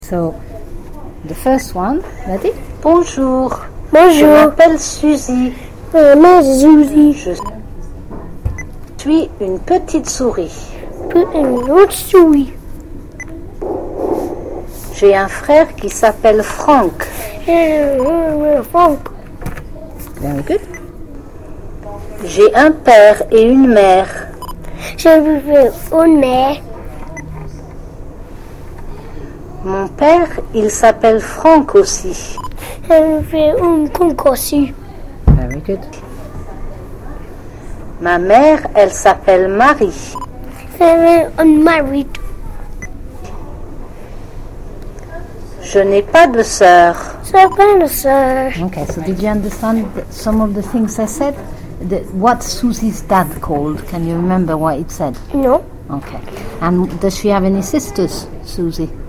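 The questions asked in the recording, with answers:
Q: What Susie's dad called? Can you remember what it said?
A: Franck

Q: And does she have any sisters, Susie?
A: No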